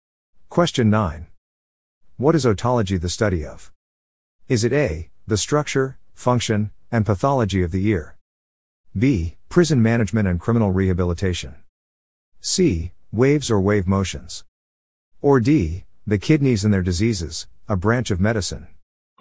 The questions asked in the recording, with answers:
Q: What is otology the study of?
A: The answer is A. The structure, function, and pathology of the ear.